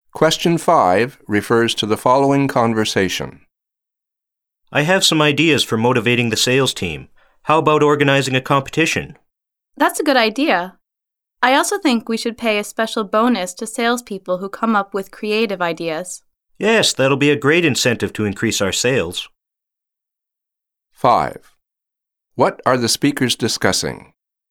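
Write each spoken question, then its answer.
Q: What are the speakers discussing?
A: Ways to motivate the sales team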